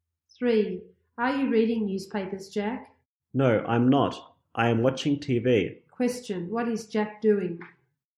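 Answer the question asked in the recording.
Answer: He is watching TV.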